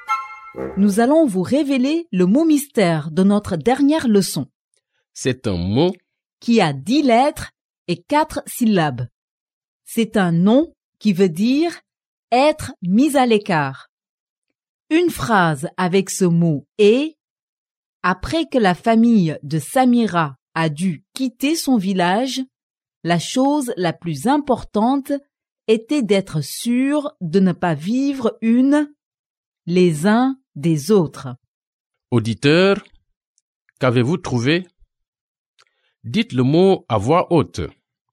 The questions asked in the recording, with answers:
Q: Auditeur, qu'avez-vous trouvé?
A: Séparation.